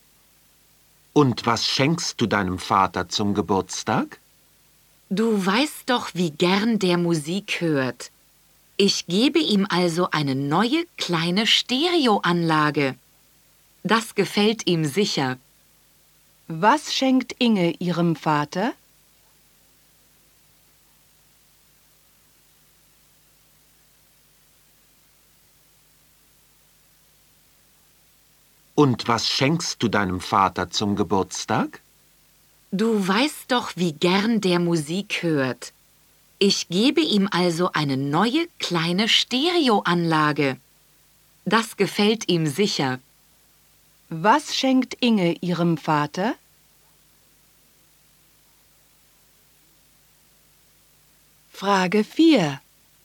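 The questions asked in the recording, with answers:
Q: Was schenkt Inge ihrem Vater?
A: Eine neue kleine Stereoanlage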